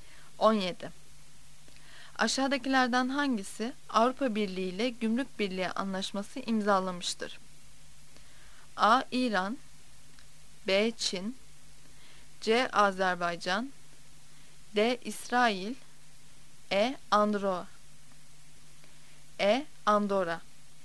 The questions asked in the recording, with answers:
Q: Aşağıdakilerden hangisi Avrupa Birliği ile Gümrük Birliği Anlaşması imzalamıştır?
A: Cevap E. Andorra.